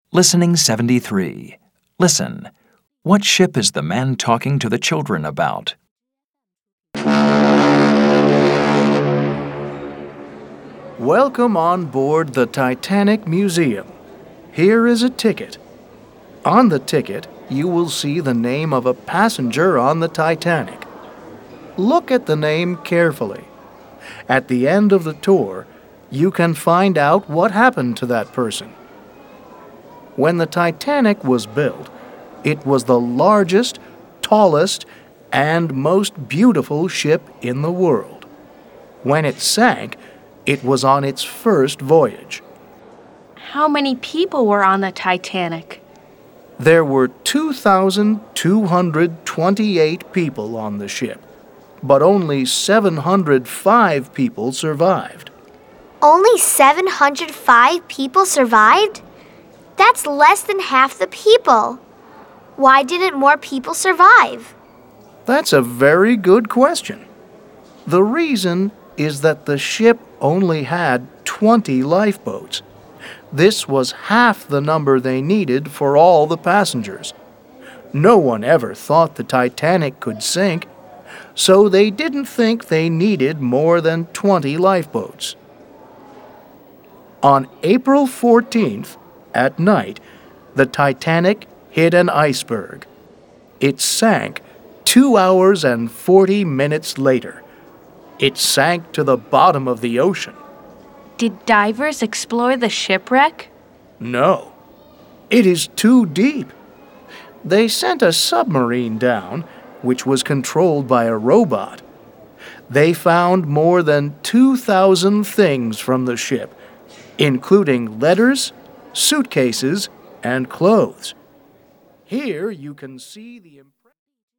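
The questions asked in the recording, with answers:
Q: What ship is the man talking to the children about?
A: The Titanic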